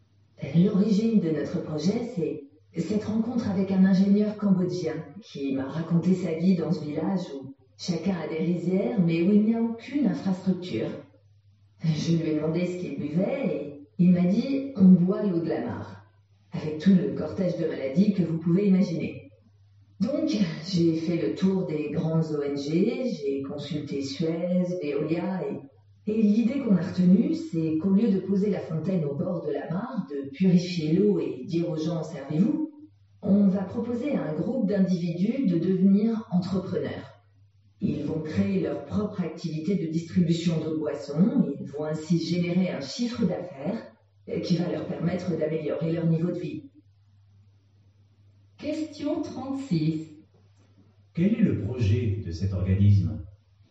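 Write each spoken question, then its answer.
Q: Quel est le projet de cet organisme ?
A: Aider des villageois cambodgiens à devenir entrepreneurs en créant leur propre activité de distribution d'eau potable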